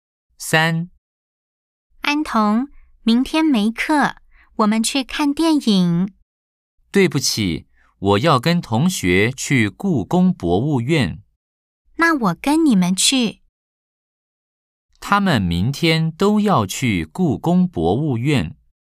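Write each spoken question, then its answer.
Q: 他们明天都要去故宫博物院。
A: O (对)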